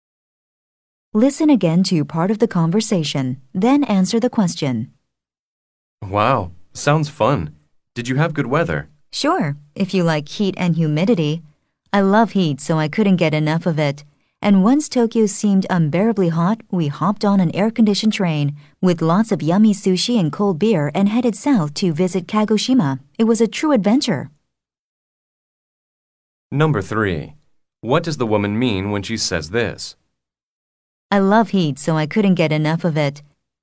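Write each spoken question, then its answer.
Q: What does the woman mean when she says this?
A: She enjoyed the hot weather very much.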